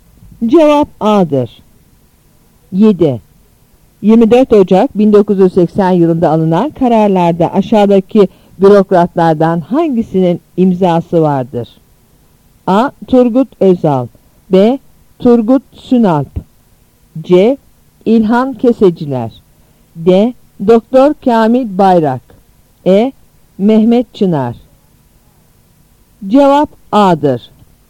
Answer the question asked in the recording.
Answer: Cevap A'dır.